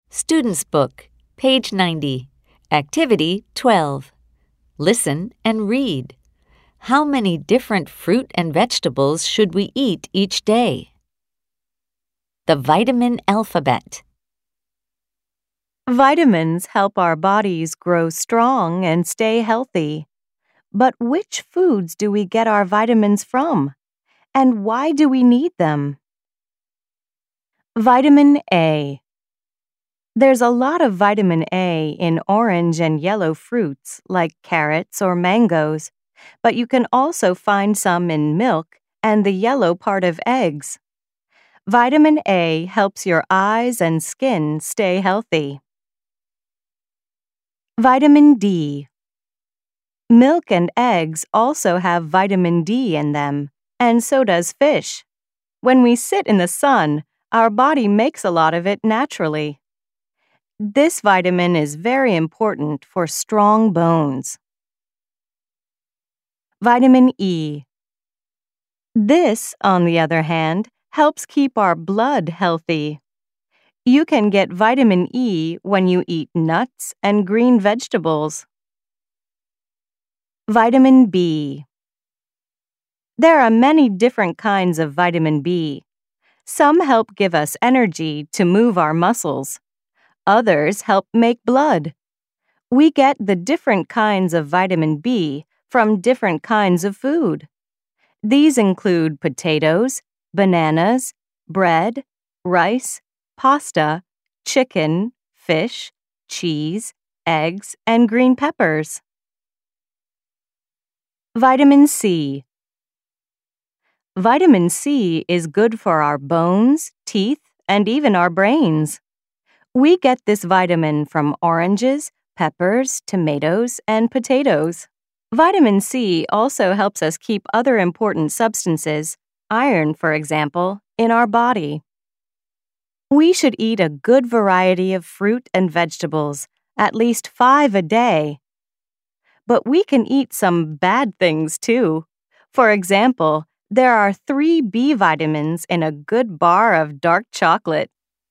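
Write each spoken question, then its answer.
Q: How many different fruit and vegetables should we eat each day?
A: At least 5 a day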